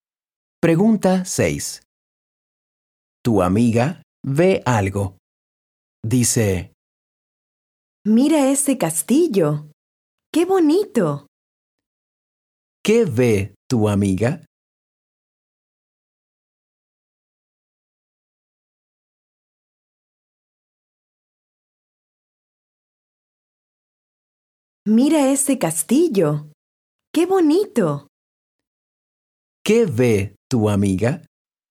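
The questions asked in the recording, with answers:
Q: ¿Qué ve tu amiga?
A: Un castillo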